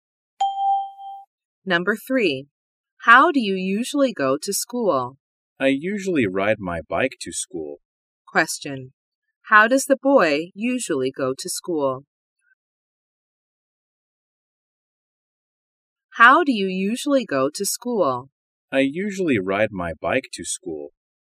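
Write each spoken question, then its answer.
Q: How does the boy usually go to school?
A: By bike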